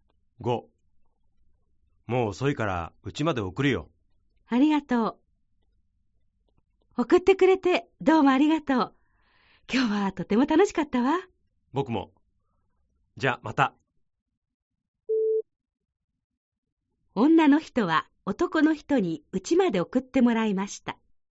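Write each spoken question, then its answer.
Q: 女の人は男の人にうちまで送ってもらいました。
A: ○(正しい)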